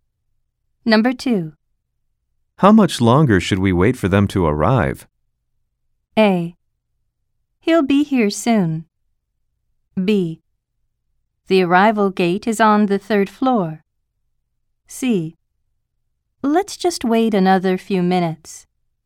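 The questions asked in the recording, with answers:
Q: How much longer should we wait for them to arrive?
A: C: Let's just wait another few minutes.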